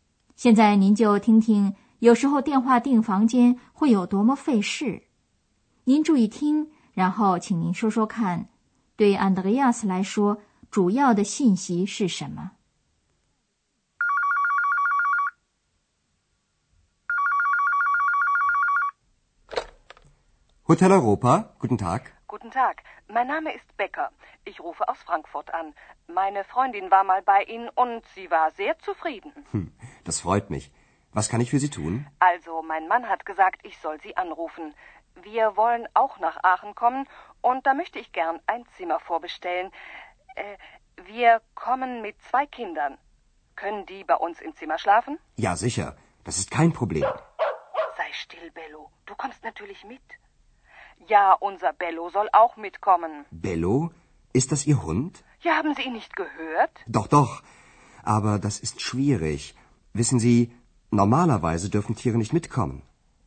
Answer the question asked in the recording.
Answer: 对于 Andreas 来说,最重要的信息是这位太太想预定一个房间,并且除了她家里人之外,她还想带一条狗来。